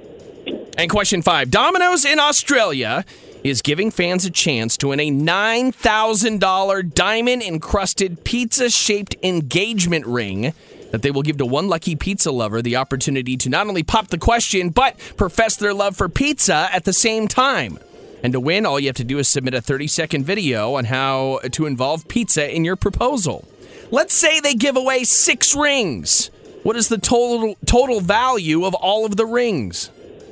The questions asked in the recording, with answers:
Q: What is the total value of all of the rings?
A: 54,000.